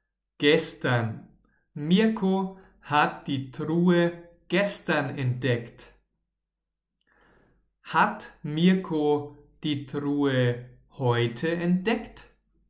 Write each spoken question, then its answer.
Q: Hat Mirko die Truhe heute entdeckt?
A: Nein, nein, nein, nein. Er hat die Truhe nicht heute entdeckt, sondern gestern.